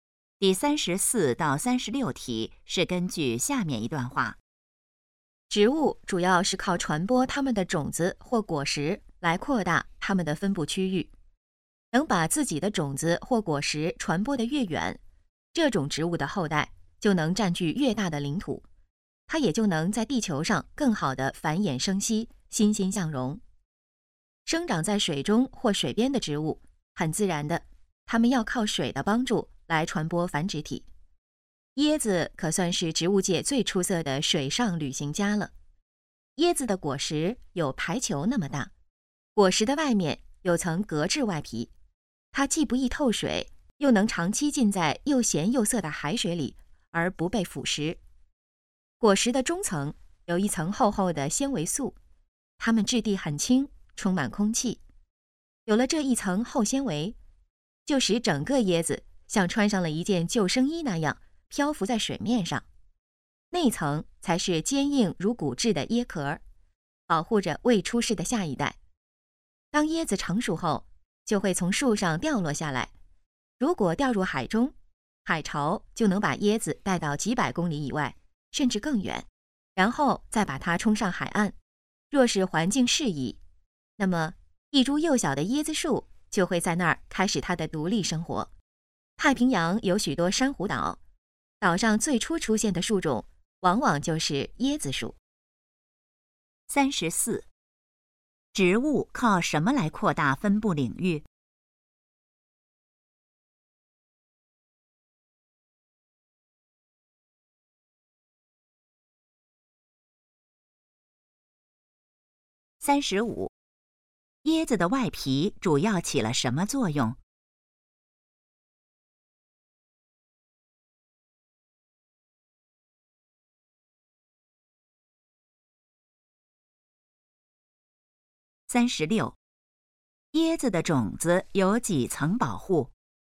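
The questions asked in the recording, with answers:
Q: 植物靠什么来扩大分布领域?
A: 传播种子或果实

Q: 椰子的外皮主要起了什么作用?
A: 不易透水,耐海水腐蚀

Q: 椰子的种子有几层保护?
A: 三层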